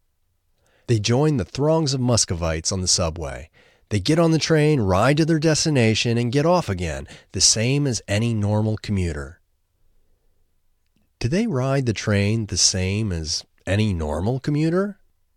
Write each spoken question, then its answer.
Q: Do they ride the train the same as any normal commuter?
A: Yes, they ride the train the same as any normal commuter.